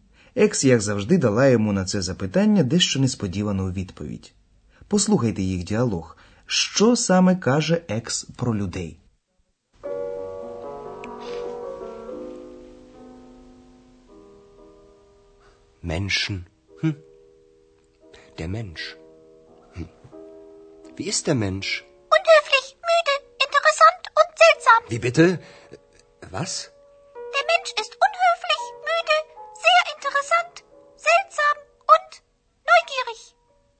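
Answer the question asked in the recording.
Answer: Людина неввічлива, втомлена, дуже цікава, дивна й допитлива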